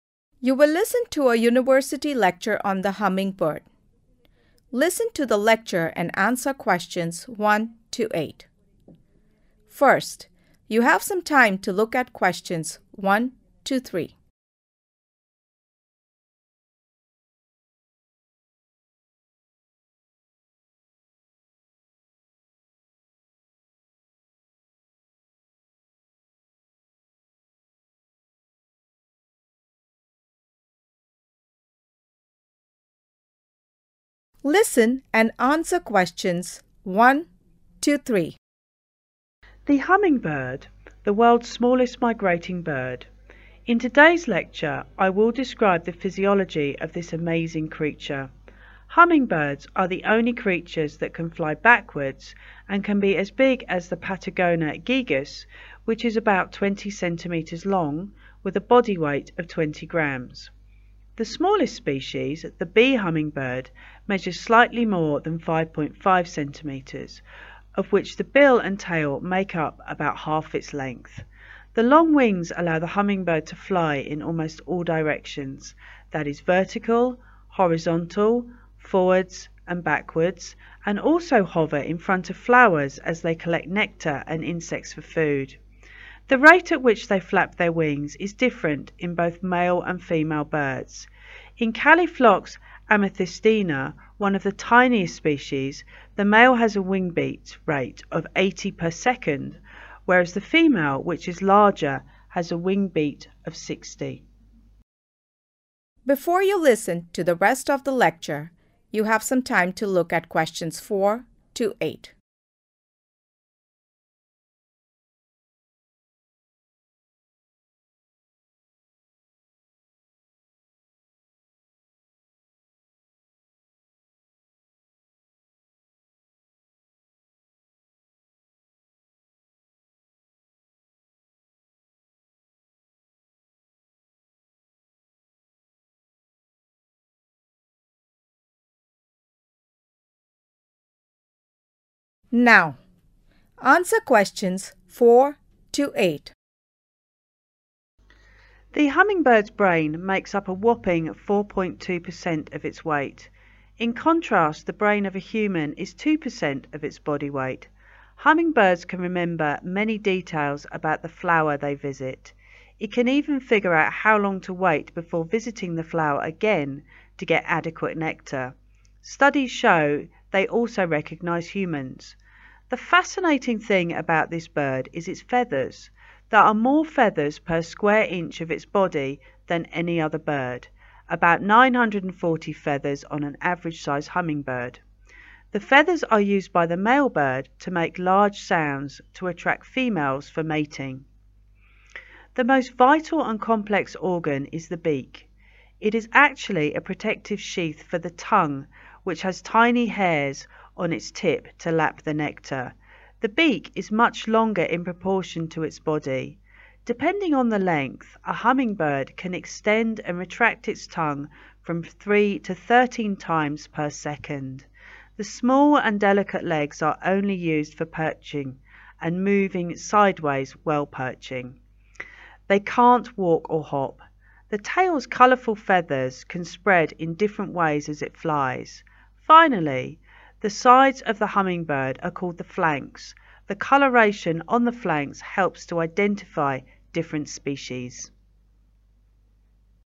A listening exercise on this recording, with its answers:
Write ONE WORD AND/OR A NUMBER for each answer.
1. onlv creature that can fly 1_________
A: backwards

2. smallest species measures just over 2___________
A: 5.5cms

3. ___________and insects for food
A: nectar

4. accounts for 4. 2 % of the bird's 4_____weight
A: body

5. recalls details of the 5_______visited earlier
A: flower

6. used by the male bird to make prominent 6_____to attract the female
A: sound

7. protects the tongue which has minute 7________to drink nectar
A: hair(s)

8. Coloration on the flanks helps to 8______different species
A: identify